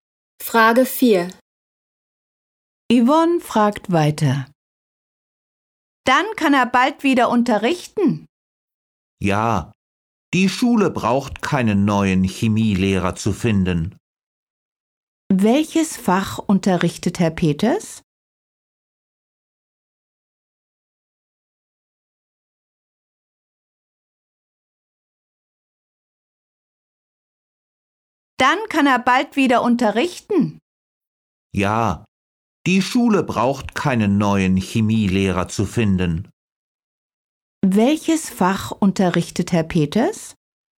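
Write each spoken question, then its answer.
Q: Welches Fach unterrichtet Herr Peters?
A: Chemie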